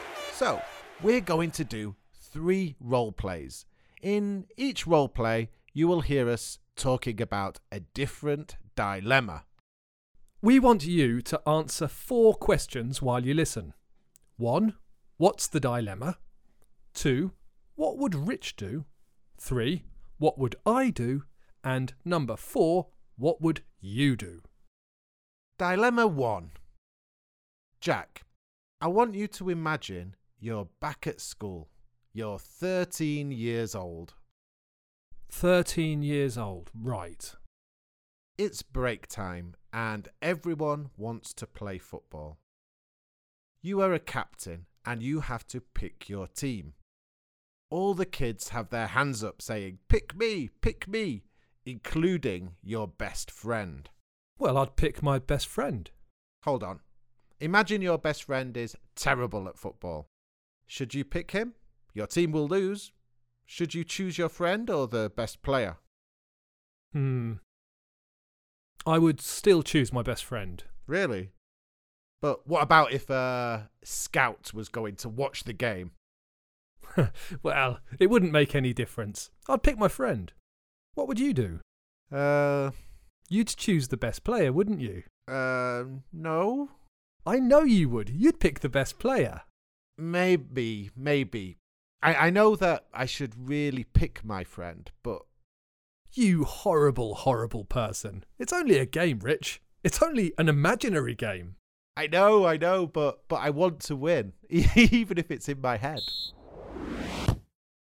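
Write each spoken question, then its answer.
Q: what's the dilemma?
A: Whether to pick his best friend, who is terrible at football, or the best player for his team

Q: what would Rich do?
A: Pick the best player

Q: what would I do?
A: Pick his best friend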